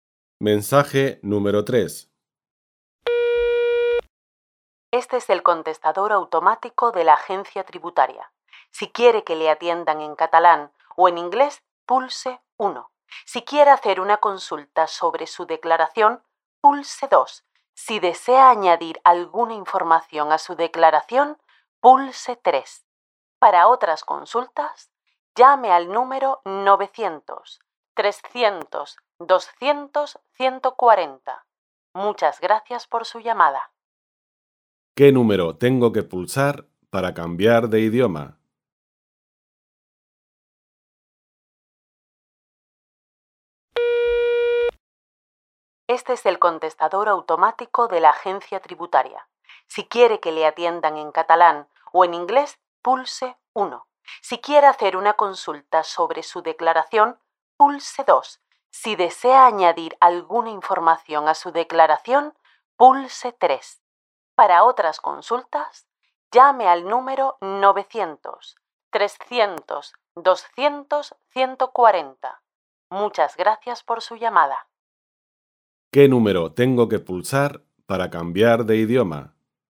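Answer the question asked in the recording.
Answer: El 1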